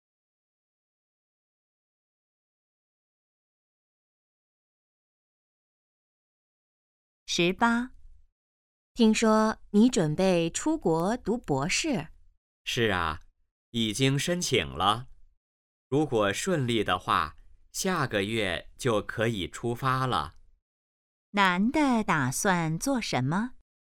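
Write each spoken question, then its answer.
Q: 男的打算做什么?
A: 出国读博士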